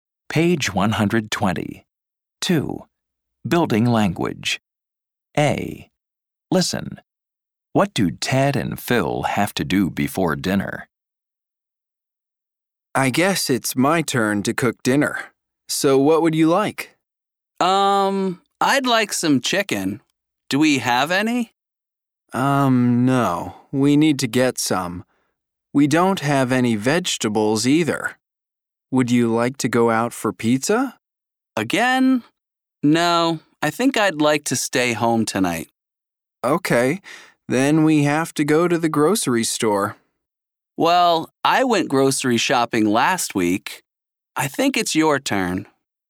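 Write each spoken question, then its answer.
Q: What do Ted and Phil have to do before dinner?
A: Go to the grocery store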